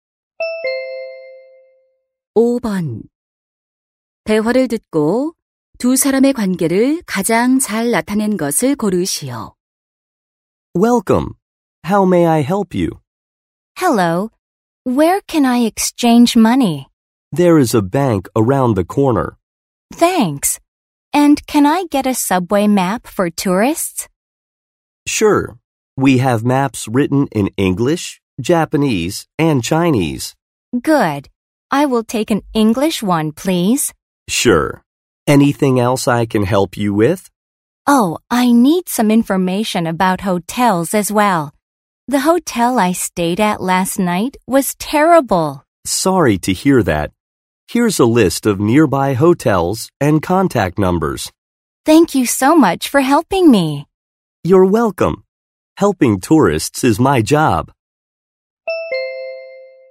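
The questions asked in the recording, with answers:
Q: 대화를 듣고 두 사람의 관계를 가장 잘 나타낸 것을 고르시오.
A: 관광 안내소 직원 - 관광객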